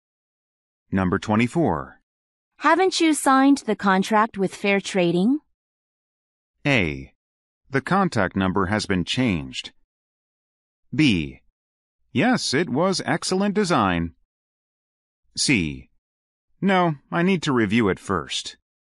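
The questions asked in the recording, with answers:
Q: Haven't you signed the contract with Fair Trading?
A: C: No, I need to review it first.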